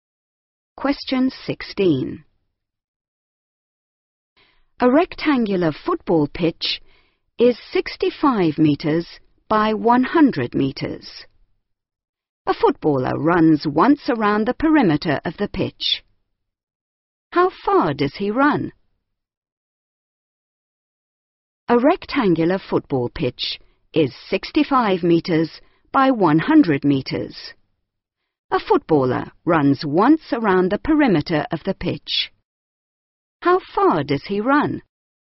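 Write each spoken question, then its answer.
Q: How far does he run?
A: 330 metres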